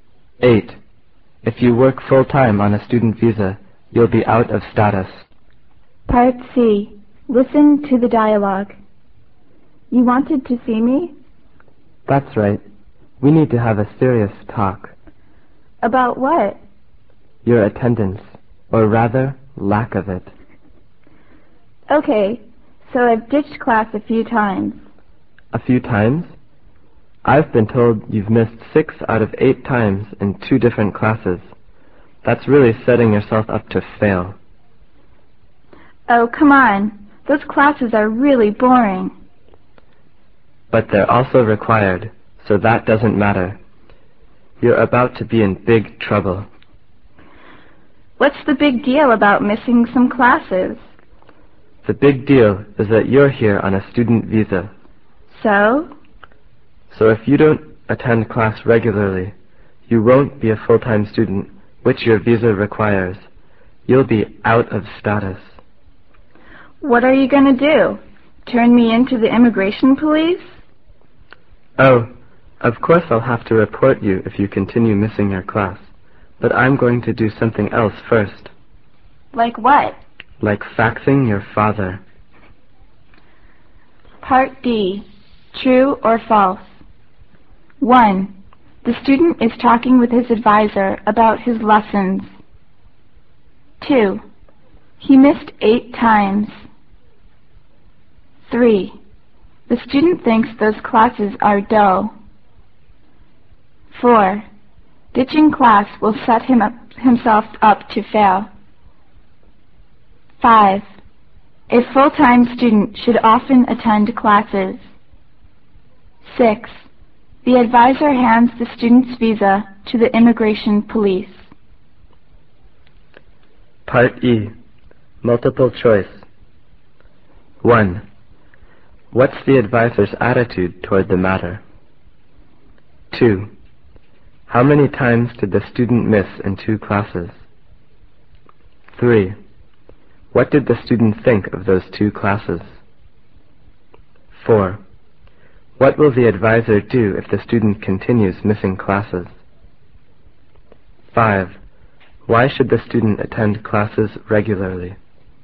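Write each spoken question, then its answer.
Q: He missed 8 times.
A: False

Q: The student thinks those classes are dull.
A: True

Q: Ditching class will set himself up to fail.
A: True

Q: A full-time student should often attend classes.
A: True

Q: The advisor hands the student's visa to the immigration police.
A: False

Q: How many times did the student miss in 2 classes?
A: 6 out of 8 times

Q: What did the student think of those 2 classes?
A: They were really boring

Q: What will the advisor do if the student continues missing classes?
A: Report him to the immigration police

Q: Why should the student attend classes regularly?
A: His student visa requires him to be a full-time student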